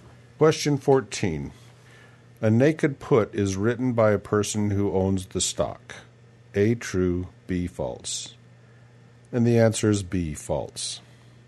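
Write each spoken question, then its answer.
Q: A naked put is written by a person who owns the stock.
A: B: false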